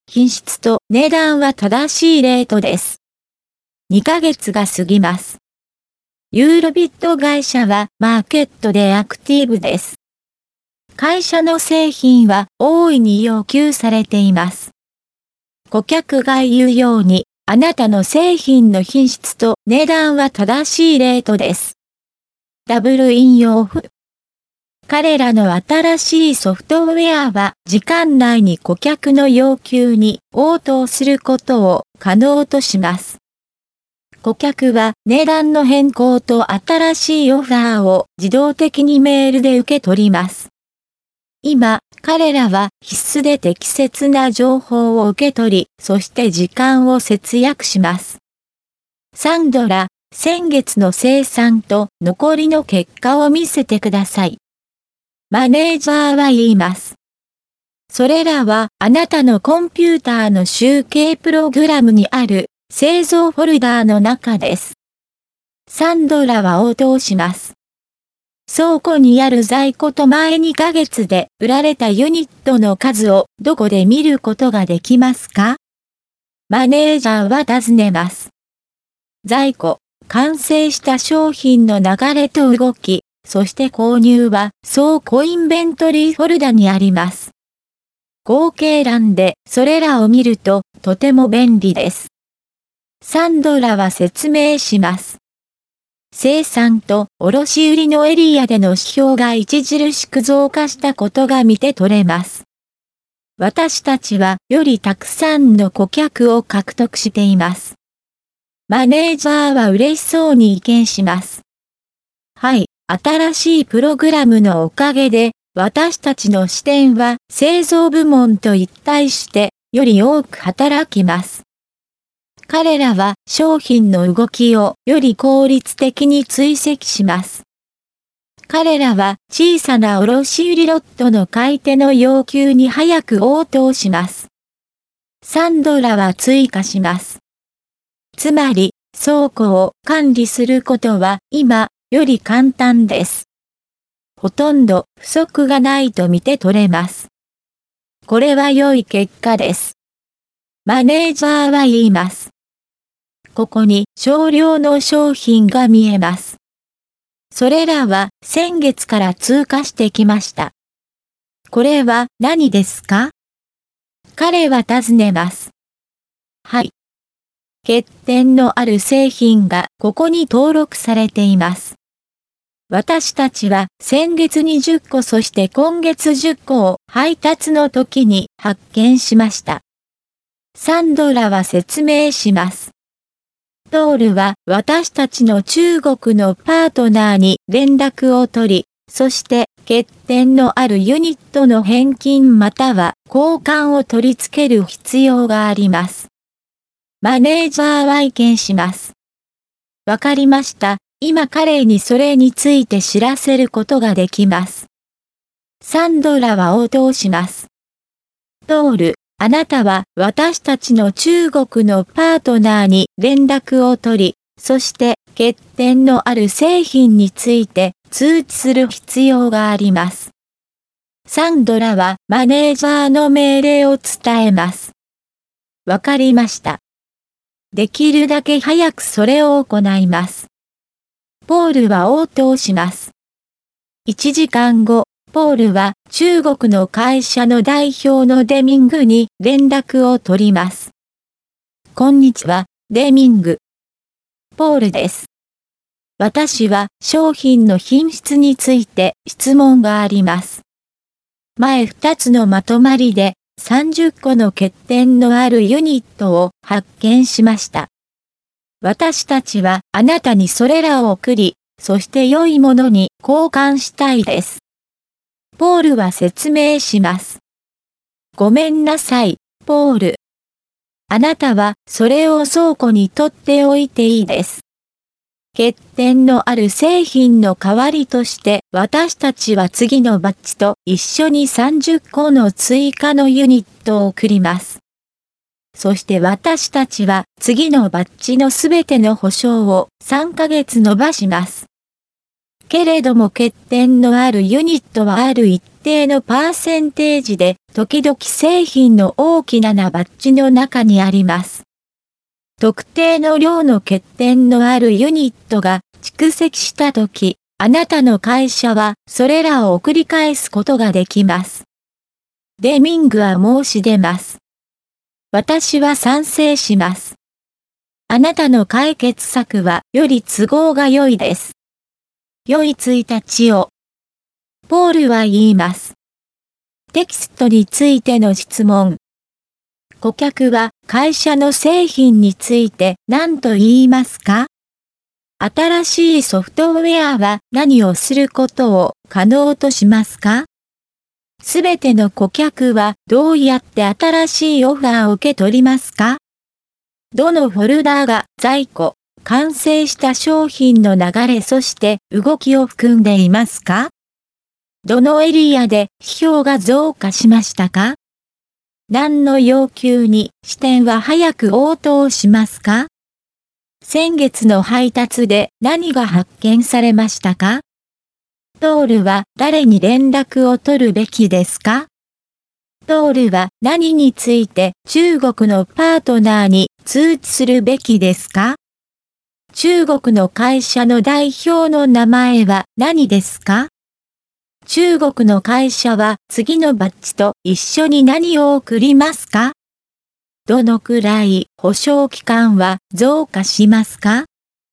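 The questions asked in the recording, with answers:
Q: 顧客は会社の製品について何と言いますか?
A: 品質と値段は正しいレートです

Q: 新しいソフトウェアは何をすることを可能としますか?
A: 時間内に顧客の要求に応答すること

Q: すべての顧客はどうやって新しいオファーを受け取りますか?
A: 自動的にメールで

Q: どのフォルダーが在庫、完成した商品の流れそして動きを含んでいますか?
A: 倉庫インベントリーフォルダ

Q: どのエリアで批評が増加しましたか?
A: 生産と卸売のエリア

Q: 何の要求に支店は早く応答しますか?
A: 小さな卸売ロットの買い手の要求

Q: 先月の配達で何が発見されましたか?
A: 欠点のある製品20個

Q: ポールは誰に連絡を取るべきですか?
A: 中国のパートナー

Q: ポールは何について中国のパートナーに通知するべきですか?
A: 欠点のある製品について

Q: 中国の会社の代表の名前は何ですか?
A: デミング

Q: 中国の会社は次のバッジと一緒に何を送りますか?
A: 30個の追加のユニット

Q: どのくらい保証期間は増加しますか?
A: 3ヶ月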